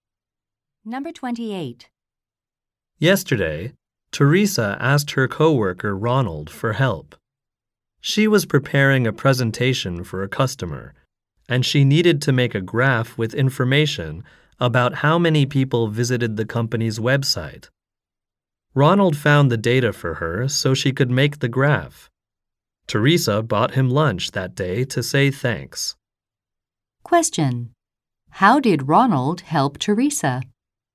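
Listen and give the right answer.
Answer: He found data for her graph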